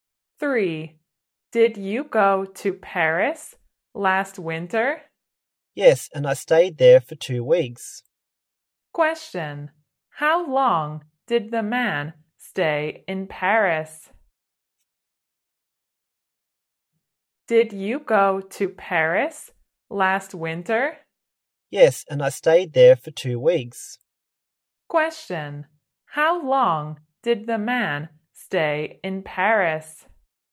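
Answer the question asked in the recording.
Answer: 2 weeks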